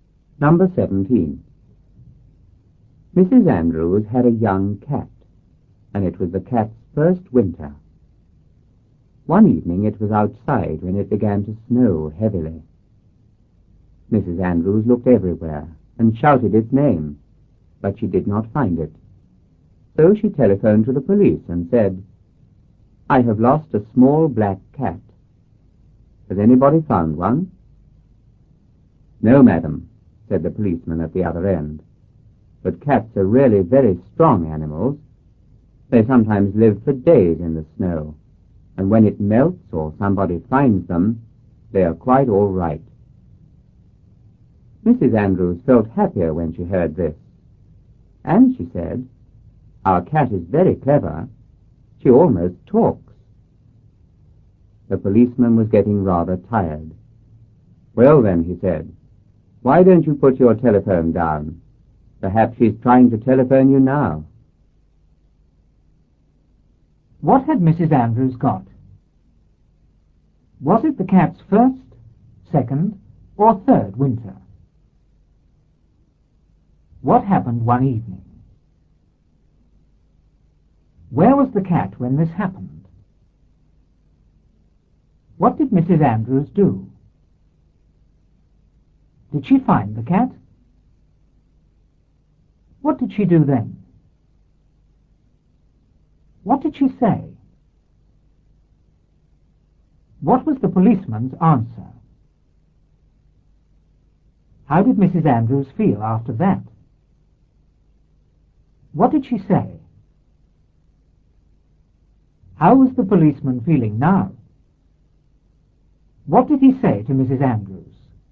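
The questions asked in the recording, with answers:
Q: What had Mrs. Andrews got?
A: A young cat

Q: Was it the cat's first, second, or third winter?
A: Its first winter

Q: What happened one evening?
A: It began to snow heavily

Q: Where was the cat when this happened?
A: Outside

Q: What did Mrs. Andrews do?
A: She looked everywhere and shouted its name

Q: Did she find the cat?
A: No

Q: What did she do then?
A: She telephoned the police

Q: What did she say?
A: I have lost a small black cat. Has anybody found one?

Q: What was the policeman's answer?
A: No, but cats are very strong and sometimes live for days in the snow

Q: How did Mrs. Andrews feel after that?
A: Happier

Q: What did she say?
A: Our cat is very clever. She almost talks.

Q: How was the policeman feeling now?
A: Rather tired

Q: What did he say to Mrs. Andrews?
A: Put your telephone down; perhaps she's trying to telephone you now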